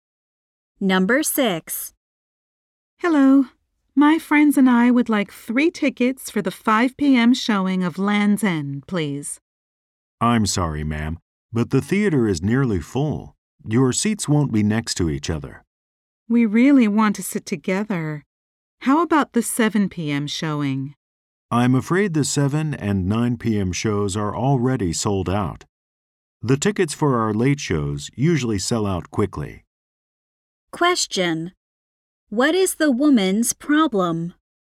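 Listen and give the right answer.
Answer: She and her friends cannot get seats together.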